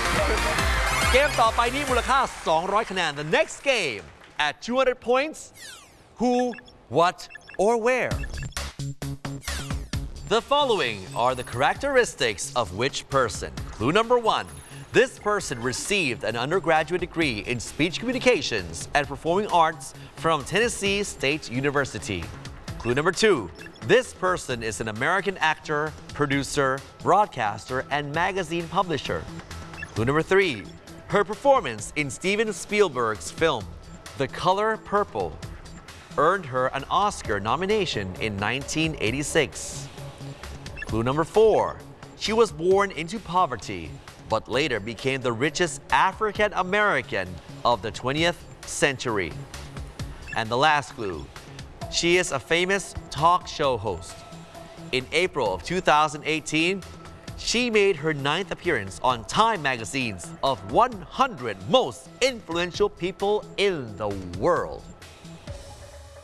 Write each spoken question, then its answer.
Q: The following are the characteristics of which person?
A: Answer we're looking for is Oprah Winfrey